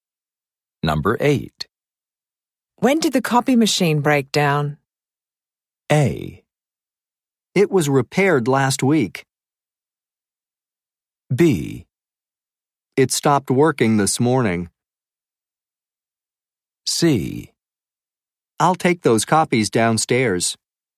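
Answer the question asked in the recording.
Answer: B: It stopped working this morning.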